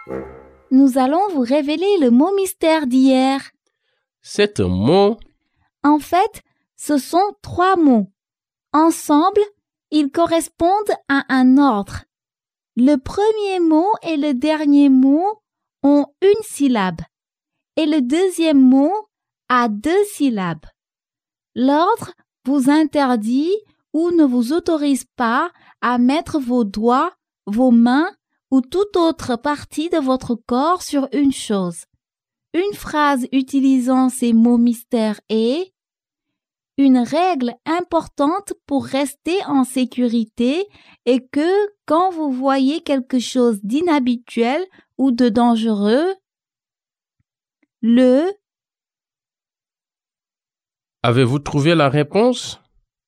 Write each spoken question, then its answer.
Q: Avez-vous trouvé la réponse?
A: Les mots mystères d'aujourd'hui sont « Ne touchez pas ».